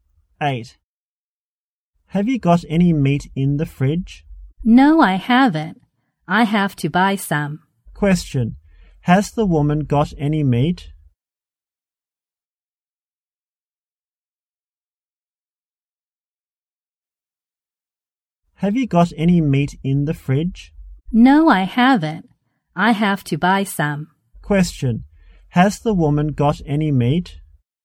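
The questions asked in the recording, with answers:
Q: Has the woman got any meat?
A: No, she hasn't.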